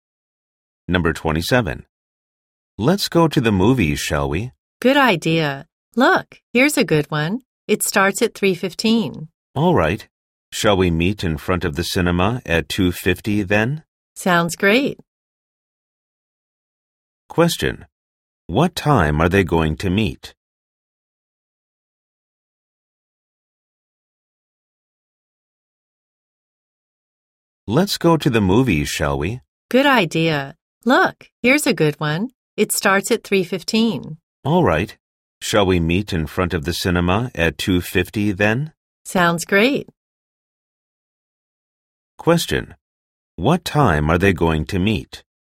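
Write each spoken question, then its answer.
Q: What time are they going to meet?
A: At 2:50.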